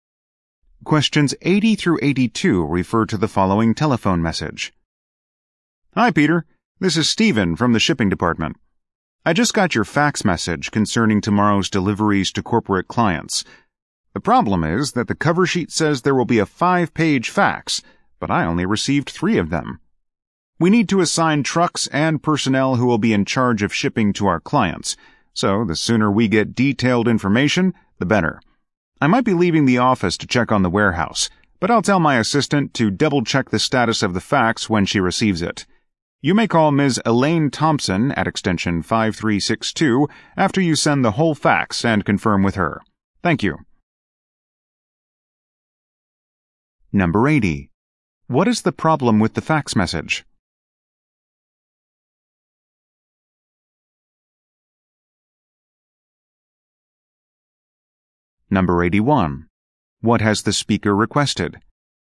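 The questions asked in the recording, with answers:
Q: What is the problem with the fax message?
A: Only 3 of the 5 pages were received

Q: What has the speaker requested?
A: The detailed delivery information (the rest of the fax) as soon as possible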